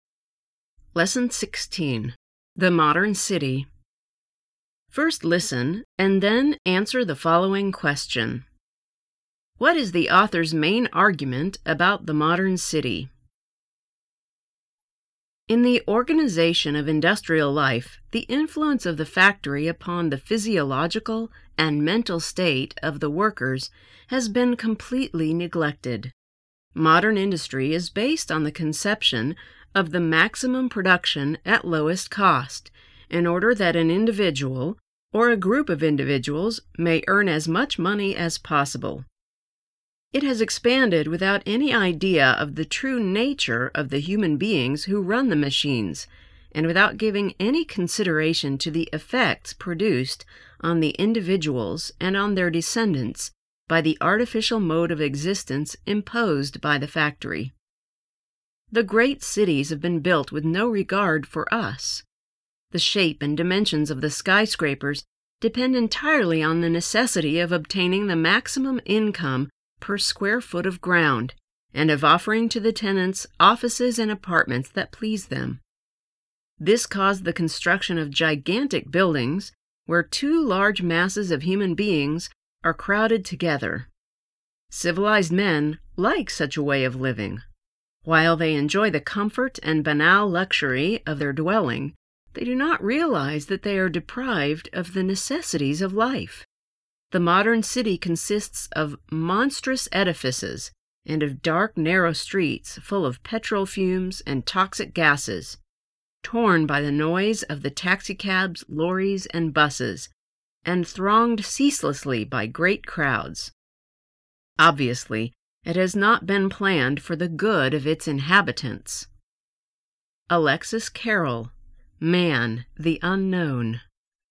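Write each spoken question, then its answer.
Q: What is the author's main argument about the modern city?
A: The modern city was built for maximum profit with no regard for the health and well-being of its inhabitants.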